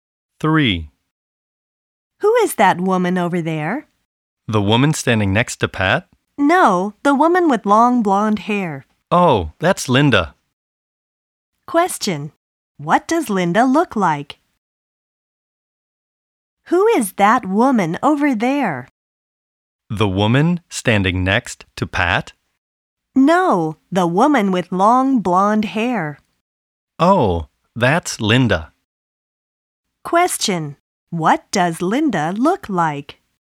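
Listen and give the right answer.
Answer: She has long blonde hair.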